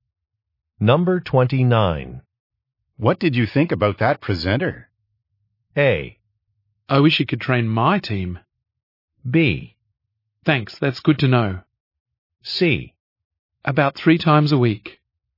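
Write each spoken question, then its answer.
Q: What did you think about that presenter?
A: A: I wish he could train my team.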